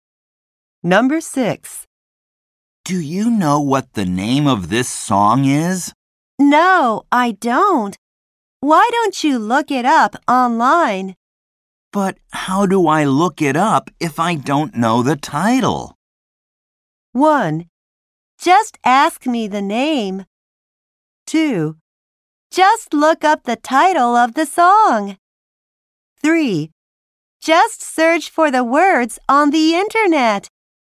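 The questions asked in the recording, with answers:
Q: But how do I look it up if I don't know the title?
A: 3: Just search for the words on the internet.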